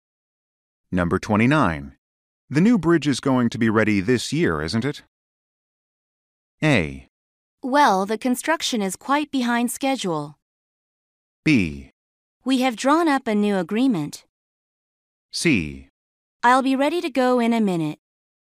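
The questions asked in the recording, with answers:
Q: The new bridge is going to be ready this year, isn't it?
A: A: Well, the construction is quite behind schedule.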